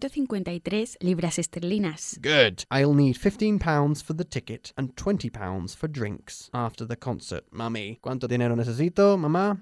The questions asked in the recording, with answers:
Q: ¿Cuánto dinero necesito, mamá?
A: 35 libras esterlinas.